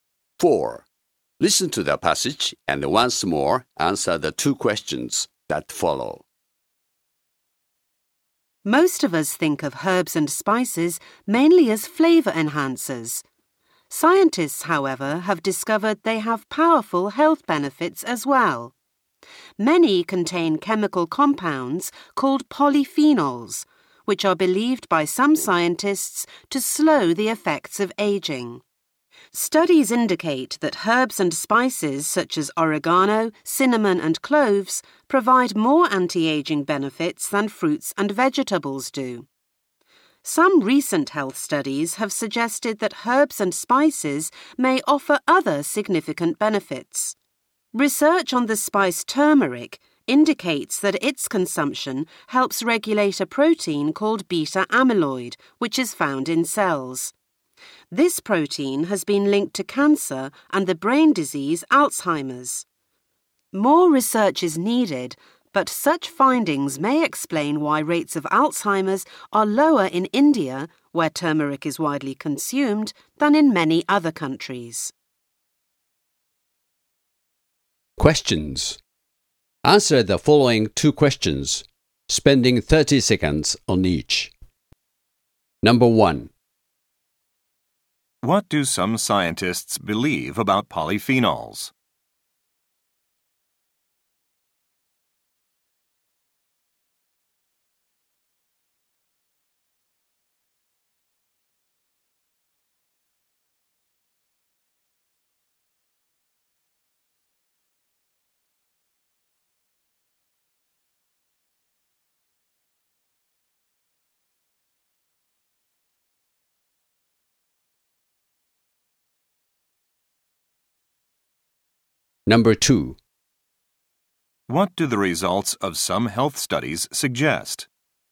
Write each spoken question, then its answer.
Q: What do some scientists believe about polyphenols?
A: Some scientists believe that polyphenols may be able to slow the aging process.

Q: What do the results of some health studies suggest?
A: Recent health studies have shown that some herbs and spices may have significant health benefits related to cancer and diseases of the brain.